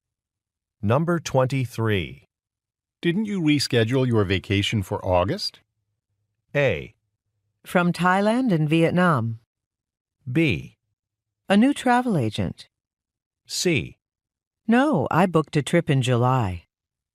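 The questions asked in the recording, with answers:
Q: Didn't you reschedule your vacation for August?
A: C: No, I booked a trip in July.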